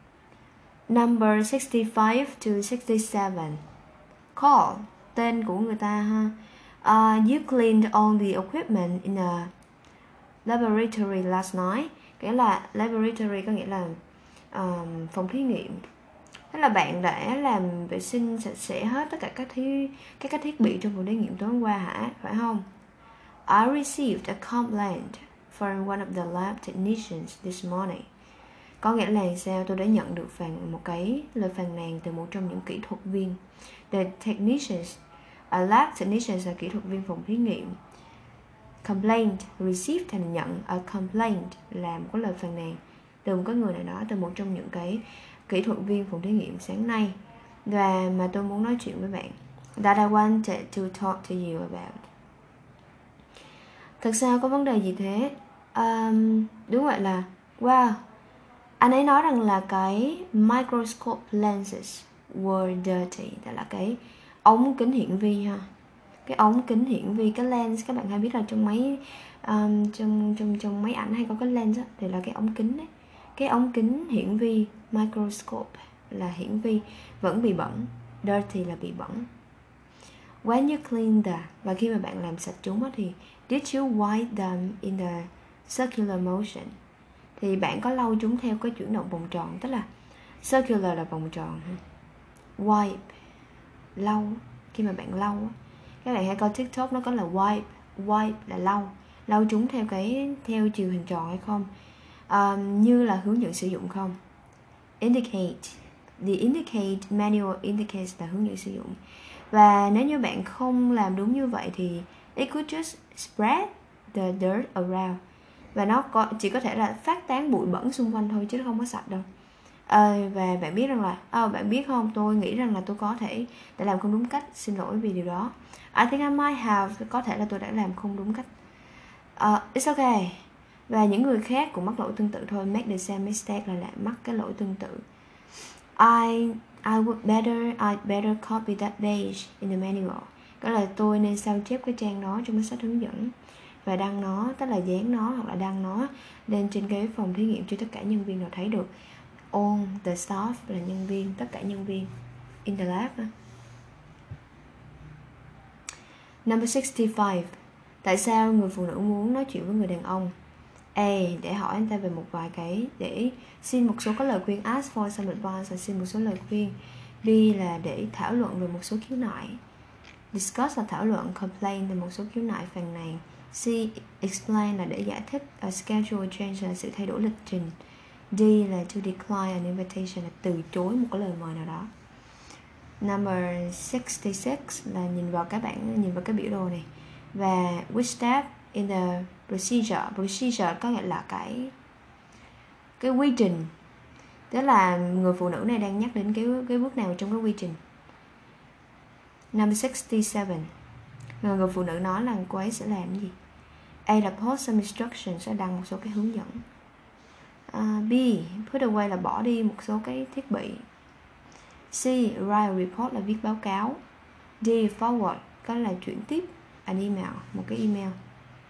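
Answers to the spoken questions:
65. B: thảo luận về một số khiếu nại
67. A: post some instructions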